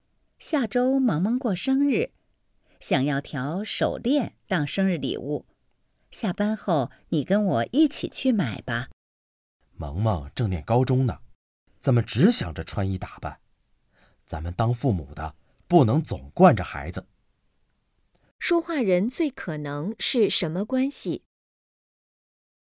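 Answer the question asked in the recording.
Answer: 夫妻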